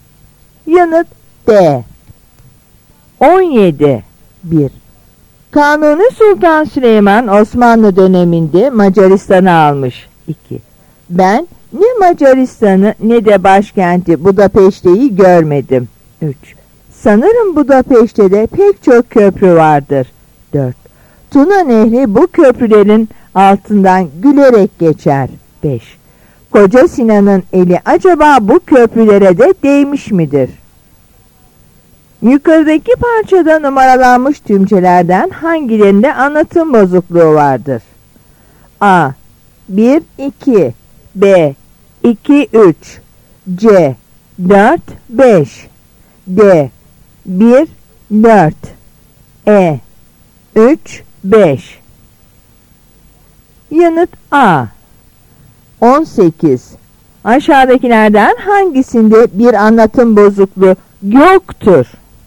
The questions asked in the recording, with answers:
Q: Yukarıdaki parçada numaralanmış tümcelerden hangilerinde anlatım bozukluğu vardır?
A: Yanıt A.